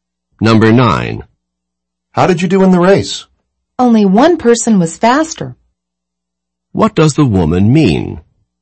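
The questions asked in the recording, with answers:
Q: What does the woman mean?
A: She came in second.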